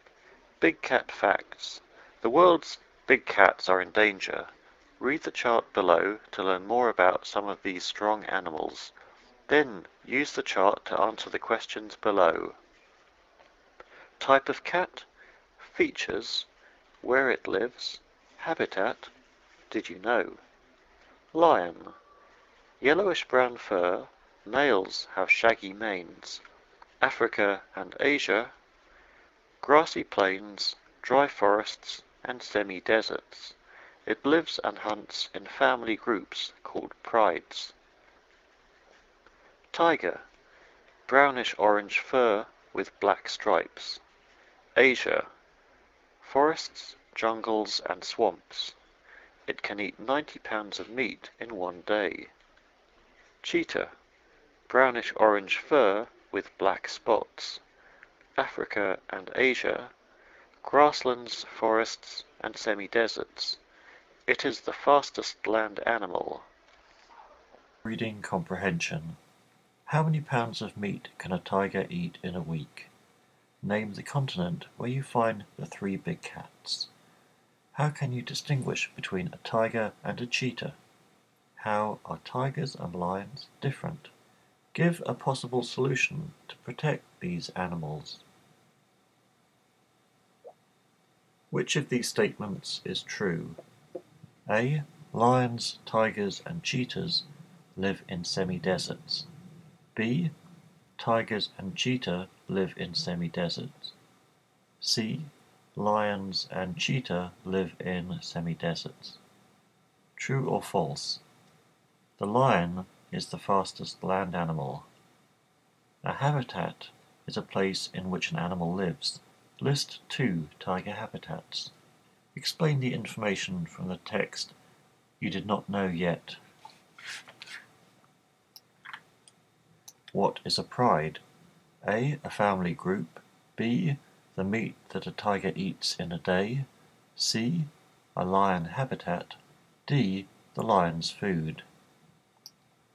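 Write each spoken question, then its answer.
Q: How many pounds of meat can a tiger eat in a week?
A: 630 pounds

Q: Name the continent where you find the three big cats.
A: Asia

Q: How can you distinguish between a tiger and a cheetah?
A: A tiger has black stripes; a cheetah has black spots

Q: Which of these statements is true?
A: C: Lions and cheetah live in semi-deserts.

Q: True or false? The lion is the fastest land animal.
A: False

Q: List 2 tiger habitats.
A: Forests and jungles (or swamps)

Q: What is a pride?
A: A: A family group.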